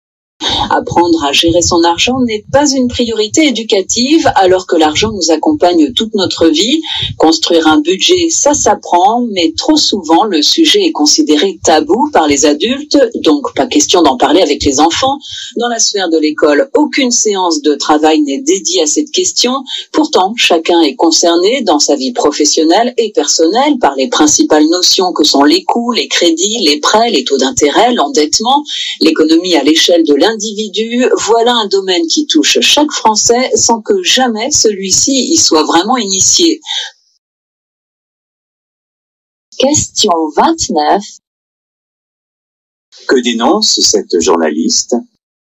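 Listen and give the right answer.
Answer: L'absence d'éducation à la gestion de l'argent, notamment à l'école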